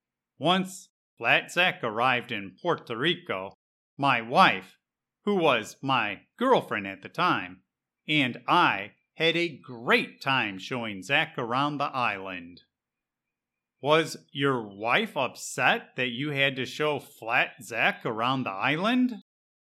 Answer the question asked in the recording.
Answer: No, not at all. We both had a great time showing Flat Zack around Puerto Rico.